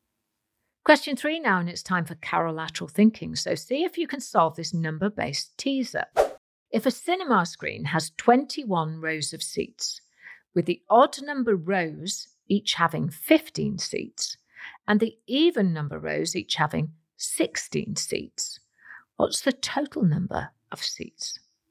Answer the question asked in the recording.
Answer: Well, the answer I was looking for was 325.